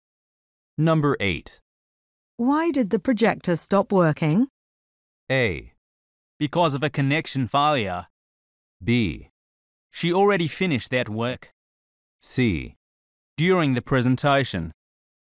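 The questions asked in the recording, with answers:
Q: Why did the projector stop working?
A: A: Because of a connection failure.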